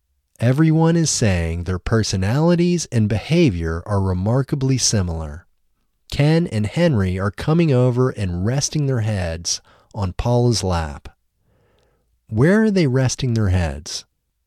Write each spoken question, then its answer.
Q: Where are they resting their heads?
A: They are resting their heads on Paula's lap.